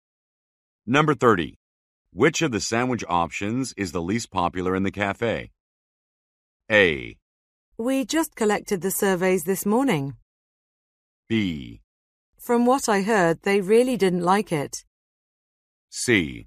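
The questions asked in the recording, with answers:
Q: Which of the sandwich options is the least popular in the cafe?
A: A: We just collected the surveys this morning.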